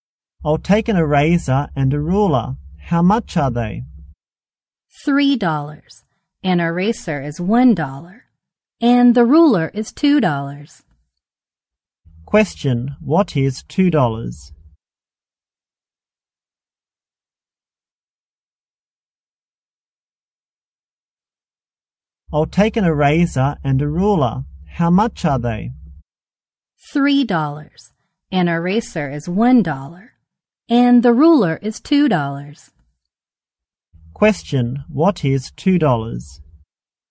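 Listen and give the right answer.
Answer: The ruler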